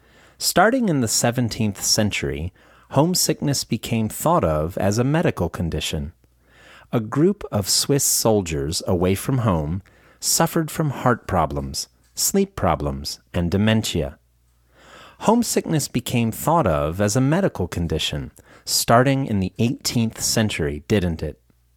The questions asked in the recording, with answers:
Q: Homesickness became thought of as a medical condition, starting in the 18th century, didn't it?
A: No, it didn't. It became thought of as a medical condition starting in the 17th century.